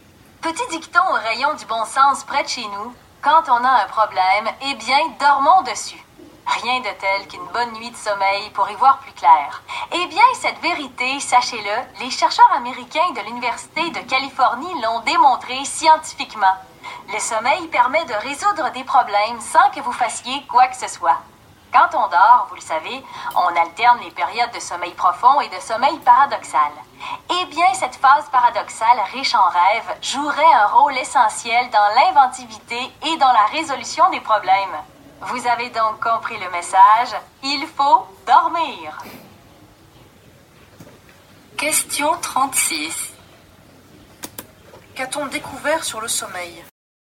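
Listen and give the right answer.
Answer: Il aide à résoudre les problèmes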